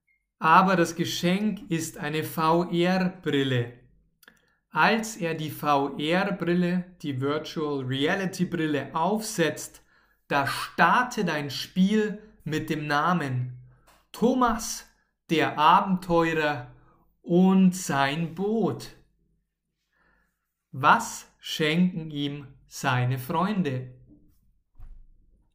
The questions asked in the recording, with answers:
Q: Was schenken ihm seine Freunde?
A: Eine VR-Brille, eine Virtual Reality-Brille.